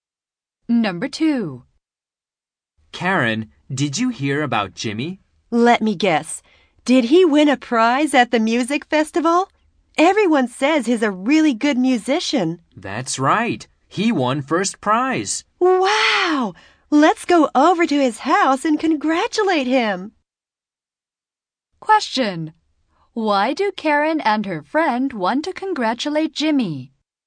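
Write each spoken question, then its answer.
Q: Why do Karen and her friend want to congratulate Jimmy?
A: He won first prize at the music festival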